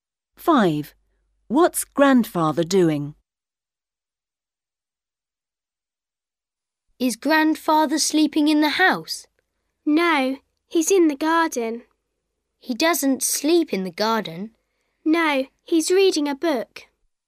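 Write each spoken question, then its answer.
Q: What's Grandfather doing?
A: Reading a book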